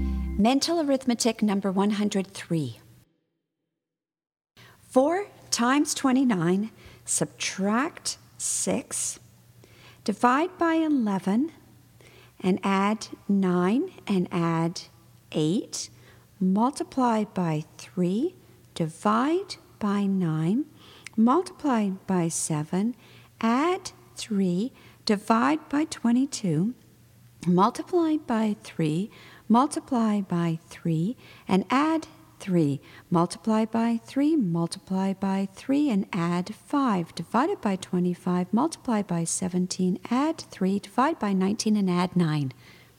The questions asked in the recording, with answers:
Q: 4 times 29, subtract 6, divide by 11, and add 9, and add 8, multiply by 3, divide by 9, multiply by 7, add 3, divide by 22, multiply by 3, multiply by 3, and add 3, multiply by 3, multiply by 3, and add 5, divided by 25, multiply by 17, add 3, divide by 19, and add 9.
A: And the answer is 19.